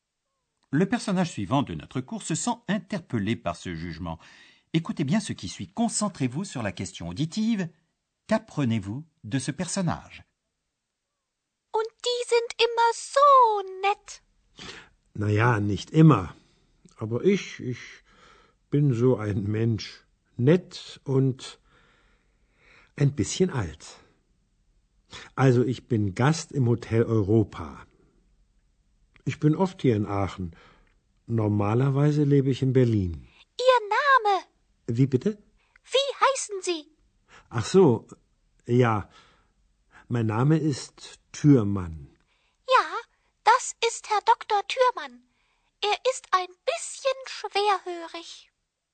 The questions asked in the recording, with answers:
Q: Qu'apprenez-vous de ce personnage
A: Eh bien d'abord, il dit qu'il est client de l'hôtel Europa.